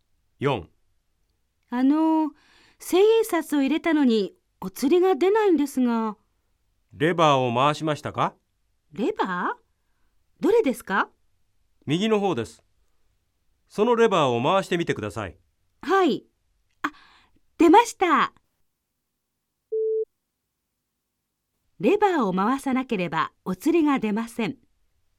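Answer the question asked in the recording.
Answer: ○(正しい)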